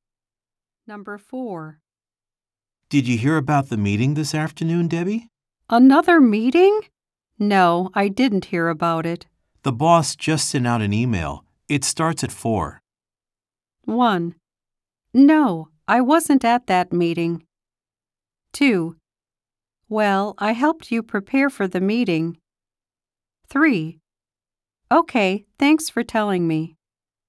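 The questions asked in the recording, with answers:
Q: It starts at 4.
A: 3: Okay, thanks for telling me.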